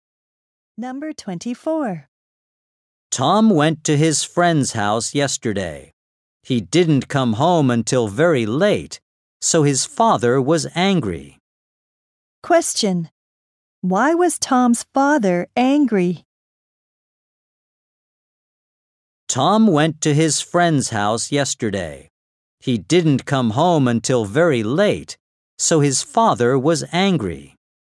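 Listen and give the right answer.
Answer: Tom came home very late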